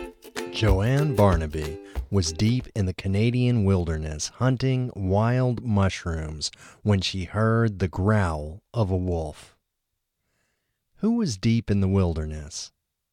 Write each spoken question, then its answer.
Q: Who was deep in the wilderness?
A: Joanne was deep in the wilderness.